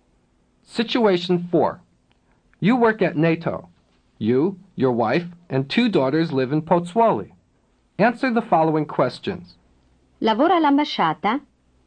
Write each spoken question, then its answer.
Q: Lavora all'ambasciata?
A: No, lavoro alla NATO.